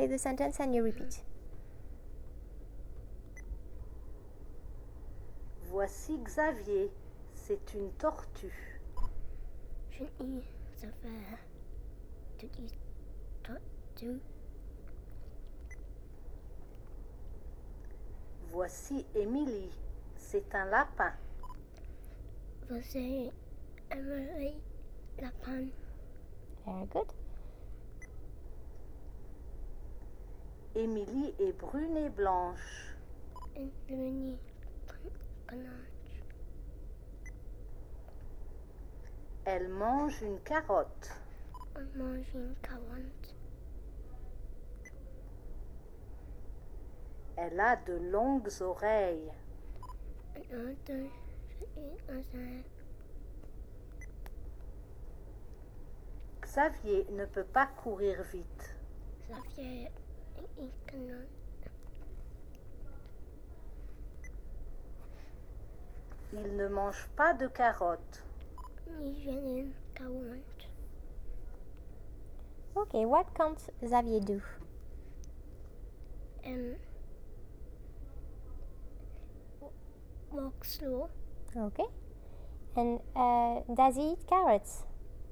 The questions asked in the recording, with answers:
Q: And does he eat carrots?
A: No.